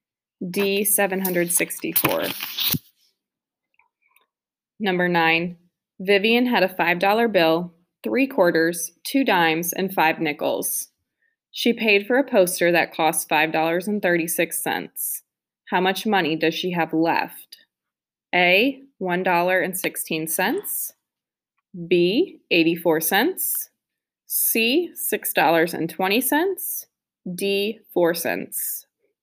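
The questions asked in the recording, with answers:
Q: How much money does she have left?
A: B: 84 cents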